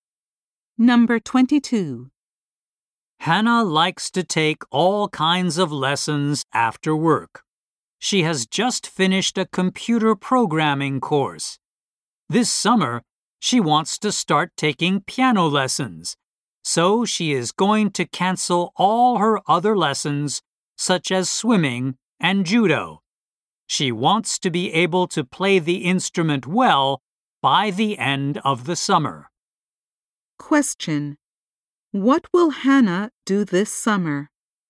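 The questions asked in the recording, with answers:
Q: What will Hannah do this summer?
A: Start taking piano lessons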